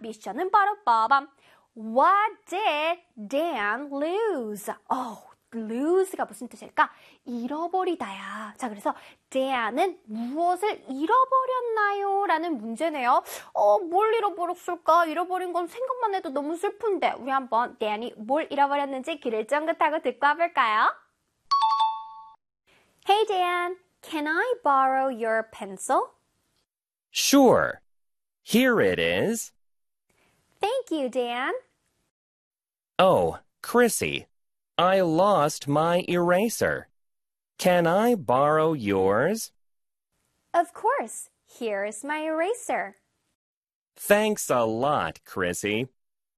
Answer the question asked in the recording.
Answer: Eraser. 나 지우개를 잃어버렸어.